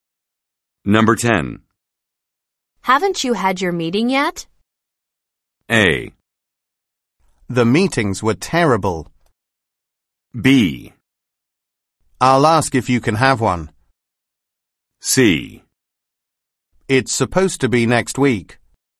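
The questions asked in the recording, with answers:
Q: Haven't you had your meeting yet?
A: C: It's supposed to be next week.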